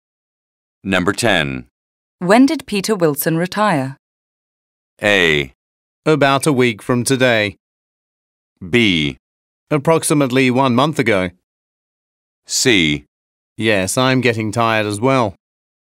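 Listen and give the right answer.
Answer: B: Approximately 1 month ago.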